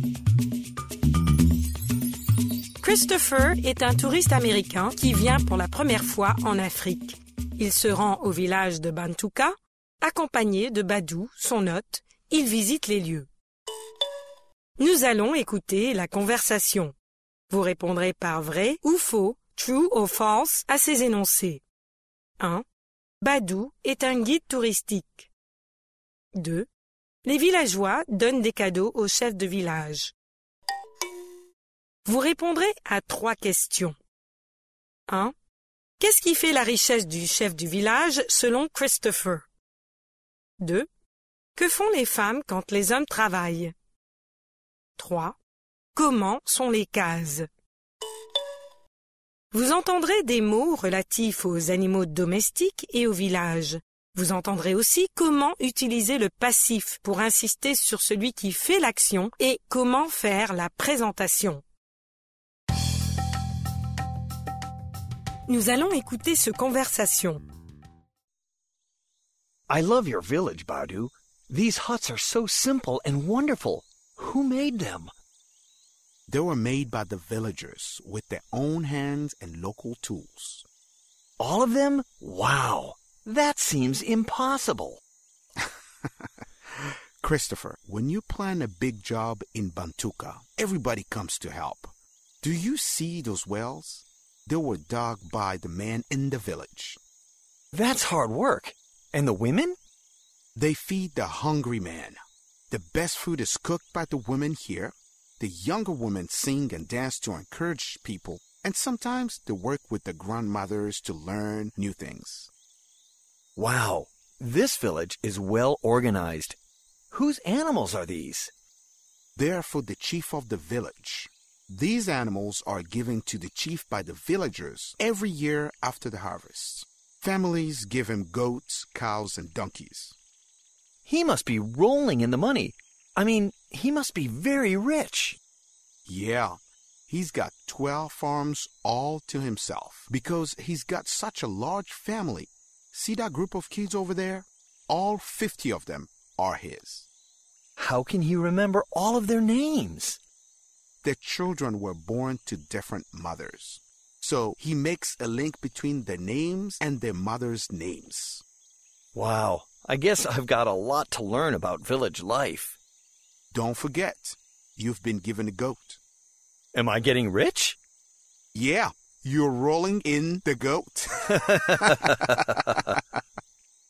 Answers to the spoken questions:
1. L'énoncé 1 est faux.
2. L'énoncé 2 est vrai. Les villageois donnent des cadeaux au chef de village.
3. Ses ânes, ses vaches et ses chèvres.
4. Elles cuisinent.
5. Elles sont simples et formidables.